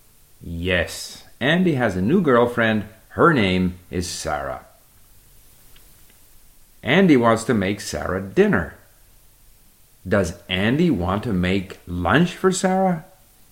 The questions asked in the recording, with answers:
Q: Does Andy want to make lunch for Sarah?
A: No, not lunch. Andy does not want to make lunch for Sarah.